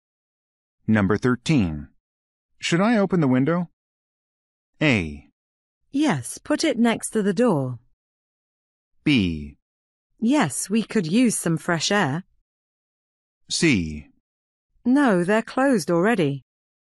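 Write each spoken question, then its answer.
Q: Should I open the window?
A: B: Yes, we could use some fresh air.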